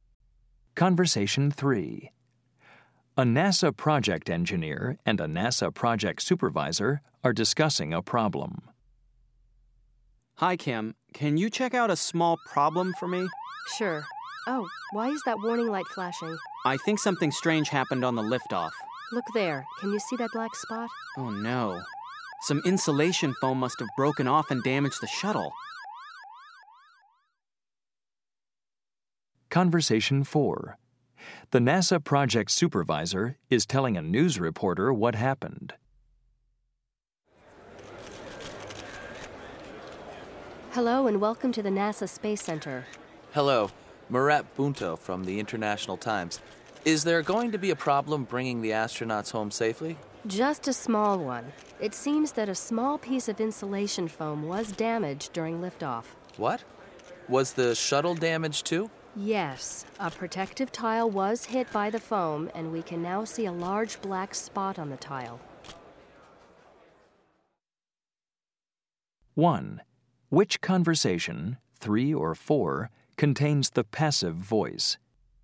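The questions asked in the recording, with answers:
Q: Which conversation, 3 or 4, contains the passive voice?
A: Conversation 4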